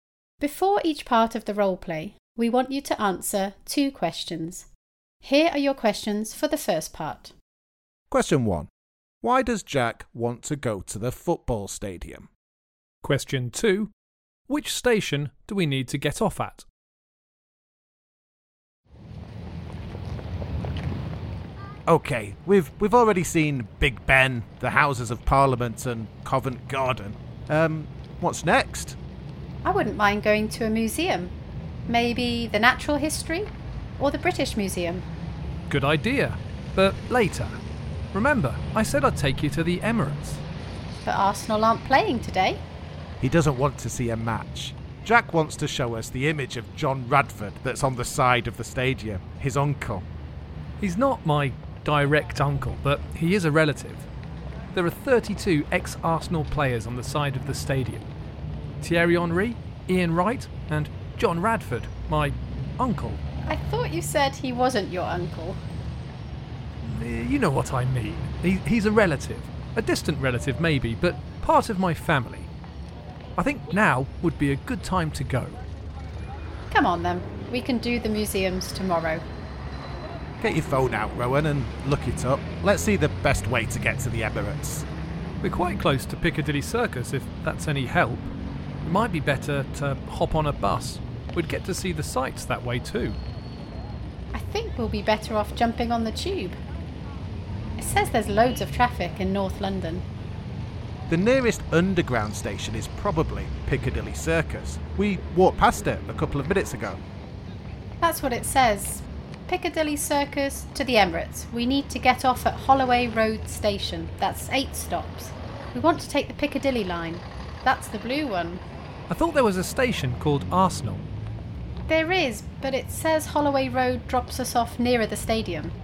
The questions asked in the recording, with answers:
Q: Why does Jack want to go to the football stadium?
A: The answer was that I wanted to show Rich and Rowan an image of one of my relatives at Arsenal's football ground.

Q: Which station do we need to get off at?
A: And the answer was Holloway Road Station.